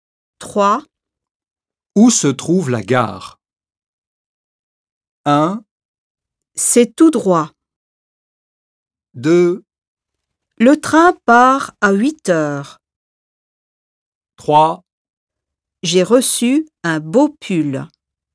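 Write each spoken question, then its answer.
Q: Où se trouve la gare ?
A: 1: C'est tout droit.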